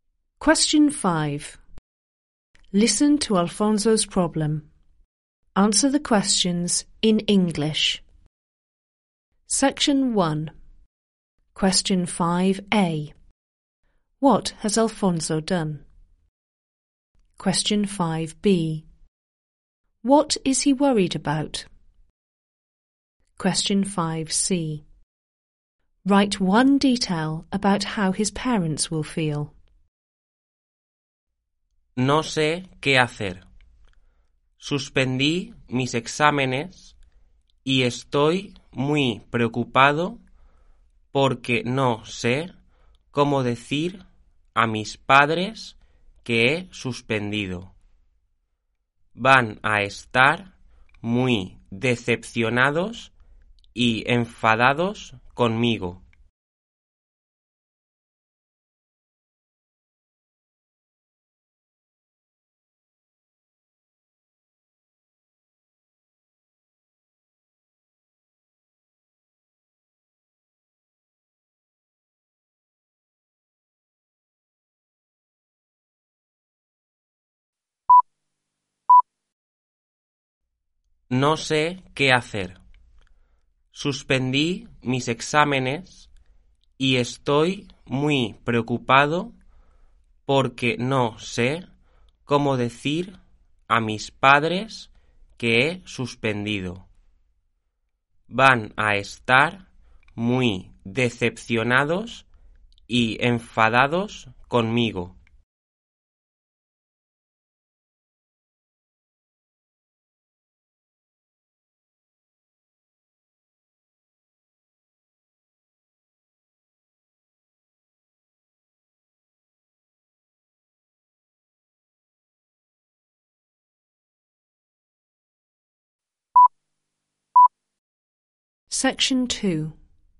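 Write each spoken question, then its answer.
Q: What has Alfonso done?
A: Failed his exams

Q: What is he worried about?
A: How to tell his parents he failed

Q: Write one detail about how his parents will feel.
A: Disappointed / angry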